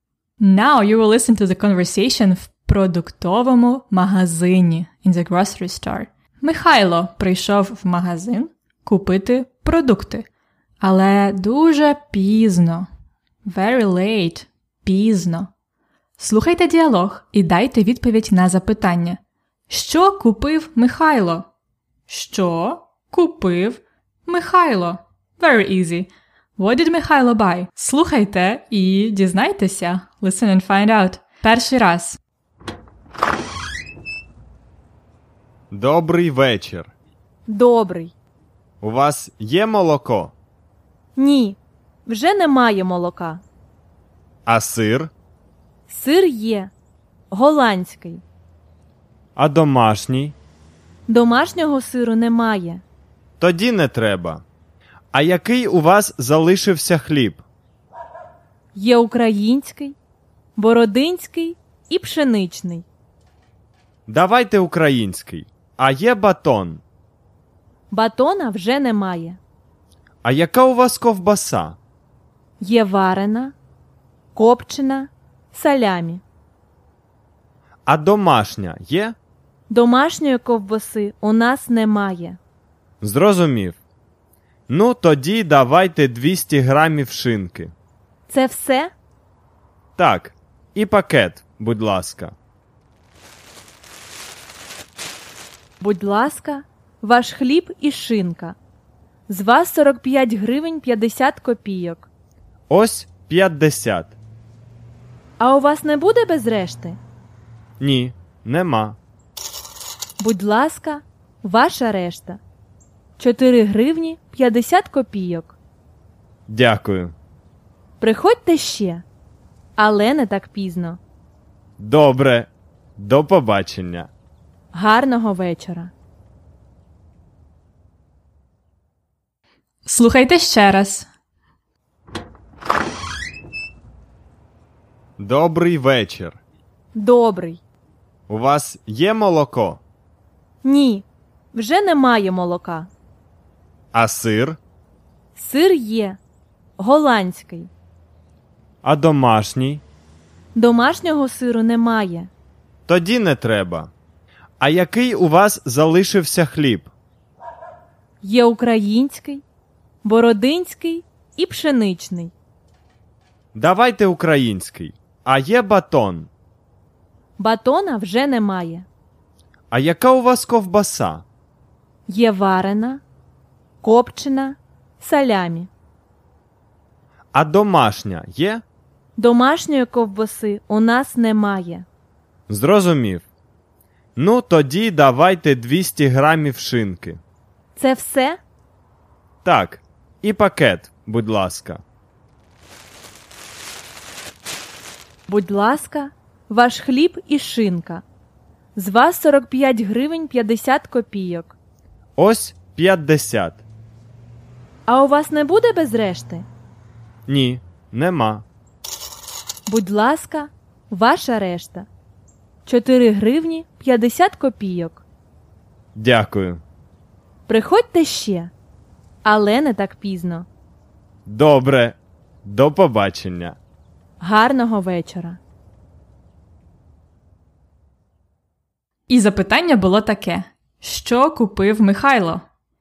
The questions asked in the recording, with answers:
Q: Що купив Михайло?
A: Він купив хліб, шинку і пакет.